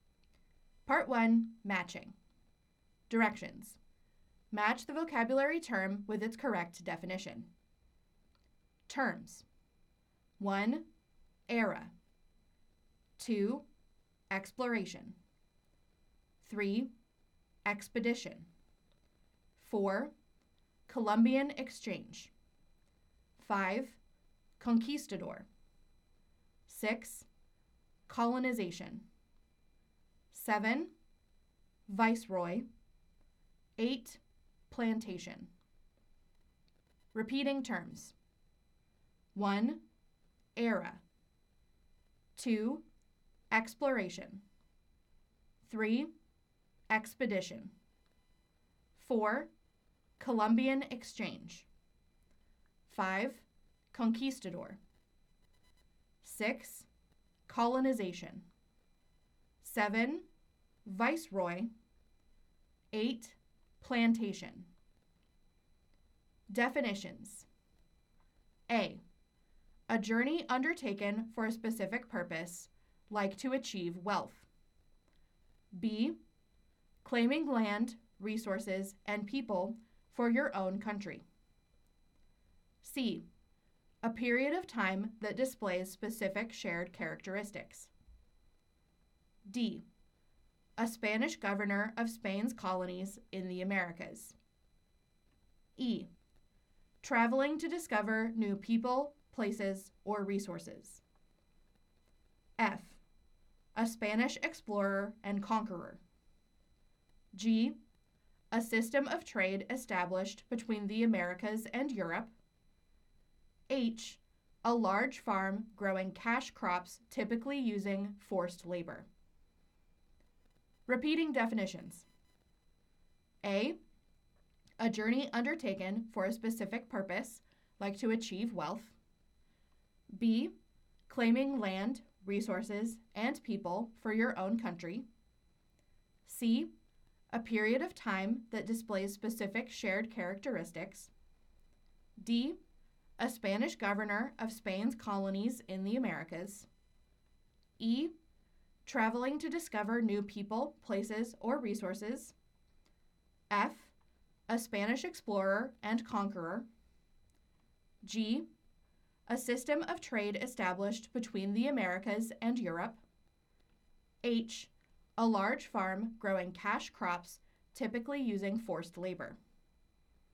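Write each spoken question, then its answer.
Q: 1. Era.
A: C: A period of time that displays specific shared characteristics.

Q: 2. Exploration.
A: E: Traveling to discover new people, places, or resources.

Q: 3. Expedition.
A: A: A journey undertaken for a specific purpose, like to achieve wealth.

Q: 4. Columbian Exchange.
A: G: A system of trade established between the Americas and Europe.

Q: 5. Conquistador.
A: F: A Spanish explorer and conqueror.

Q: 6. Colonization.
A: B: Claiming land, resources, and people for your own country.

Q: 7. Viceroy.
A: D: A Spanish governor of Spain's colonies in the Americas.

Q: 8. Plantation.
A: H: A large farm growing cash crops, typically using forced labor.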